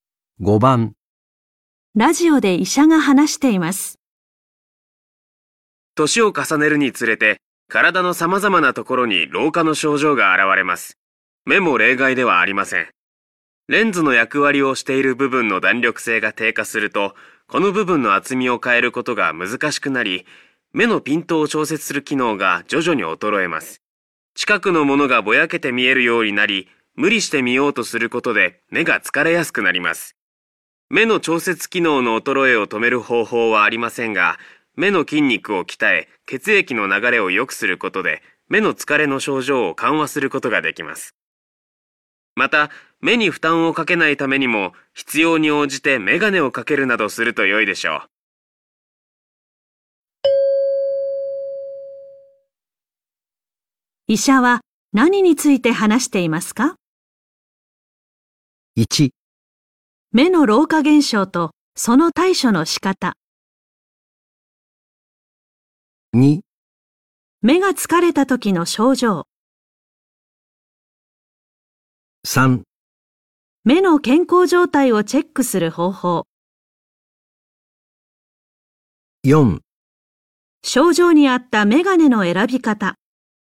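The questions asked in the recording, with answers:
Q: 医者は何について話していますか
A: 1: 目の老化現象とその対処の仕方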